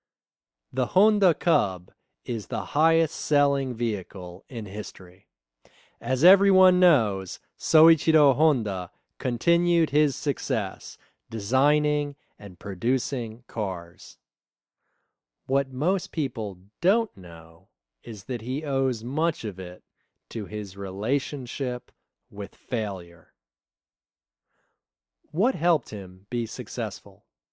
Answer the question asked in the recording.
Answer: His relationship with failure helped him be successful.